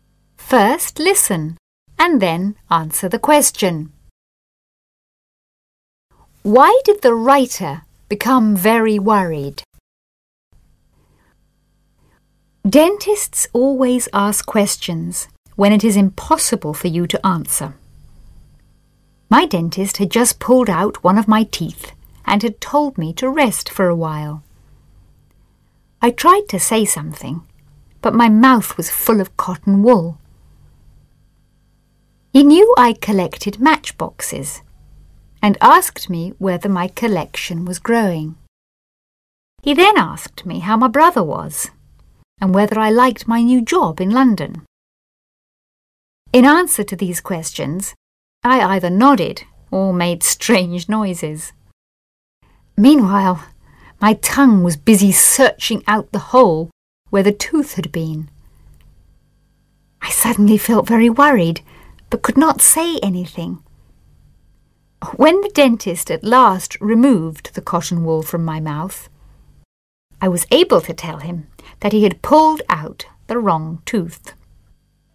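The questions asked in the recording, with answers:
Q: Why did the writer become very worried?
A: Because the dentist had pulled out the wrong tooth.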